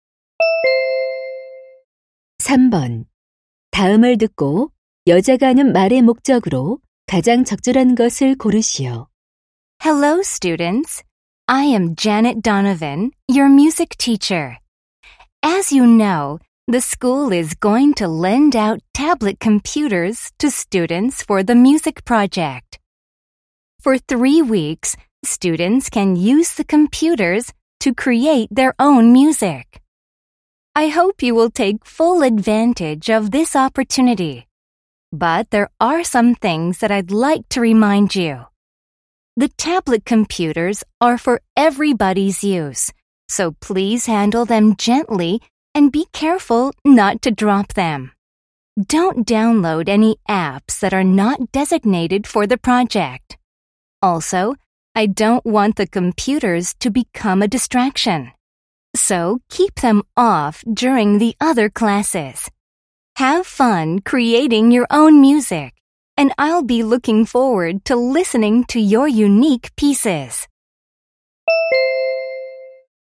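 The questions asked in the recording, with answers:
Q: 다음을 듣고 여자가 하는 말의 목적으로 가장 적절한 것을 고르시오.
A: 음악 프로젝트용 태블릿 컴퓨터 사용 시 주의 사항을 당부하려고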